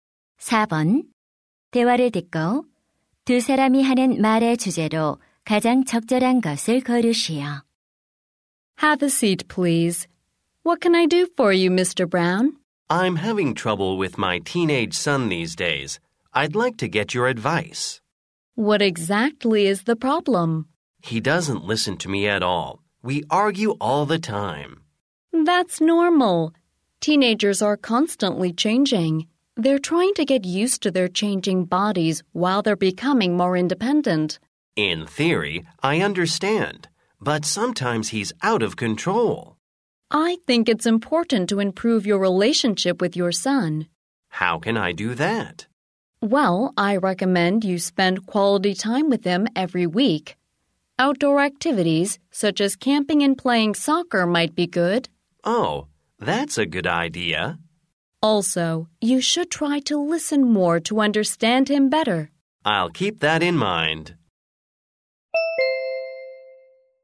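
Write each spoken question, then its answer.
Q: 대화를 듣고 두 사람이 하는 말의 주제로 가장 적절한 것을 고르시오.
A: 십대 자녀와의 관계 개선 방법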